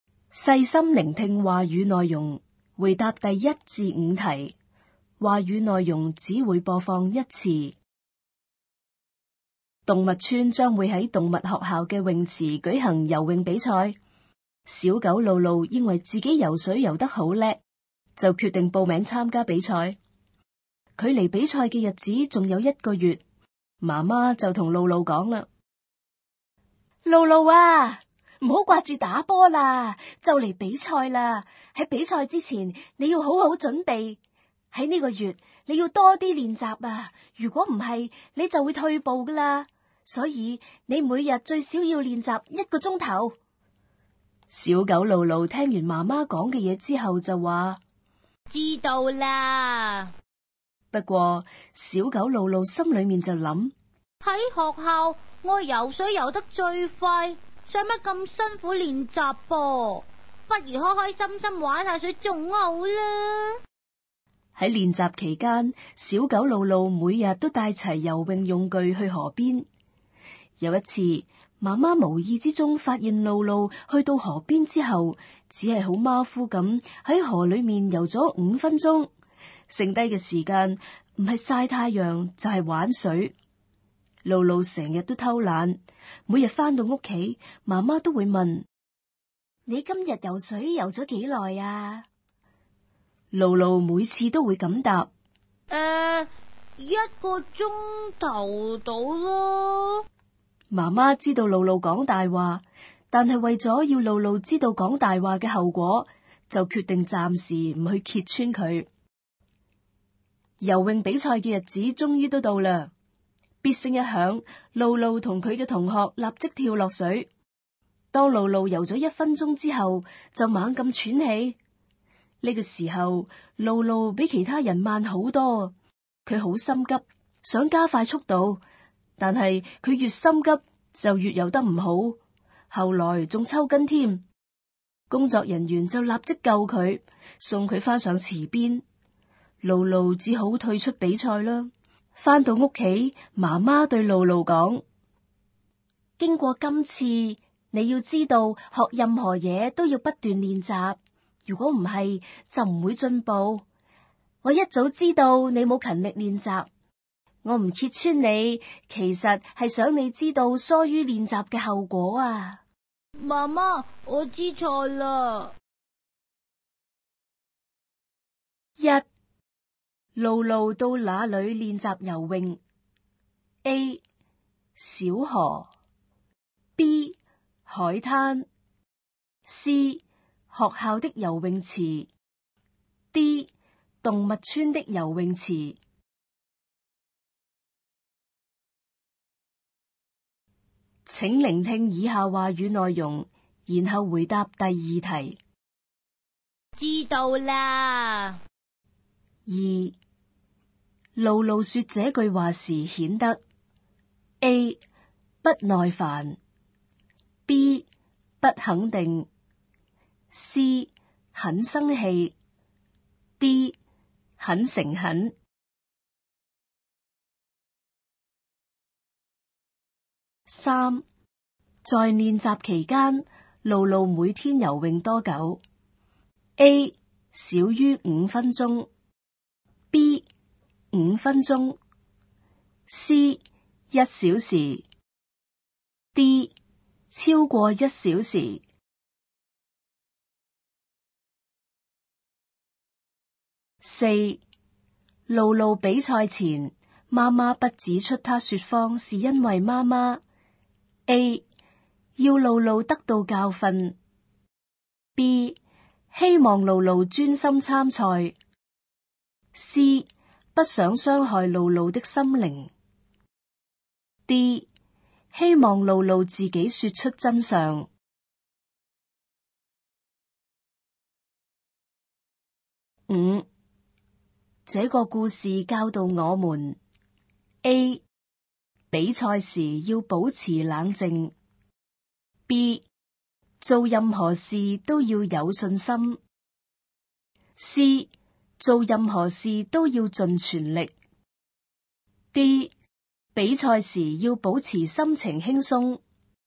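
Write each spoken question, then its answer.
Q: 露露到哪里练习游泳? A 小河, B 海滩, C 学校的游泳池, D 动物村的游泳池。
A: A: 小河

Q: 在练习期间,露露每天游泳多久? A 少于五分钟, B 五分钟, C 一小时, D 超过一小时。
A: B: 五分钟

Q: 露露比赛前妈妈不指出她说谎是因为妈妈 A 要露露得到教训, B 希望露露专心参赛, C 不想伤害露露的心灵, D 希望露露自己说出真相。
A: A: 要露露得到教训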